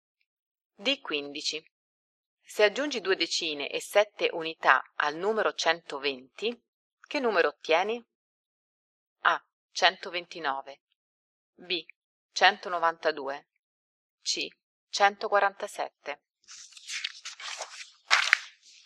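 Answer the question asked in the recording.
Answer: C: 147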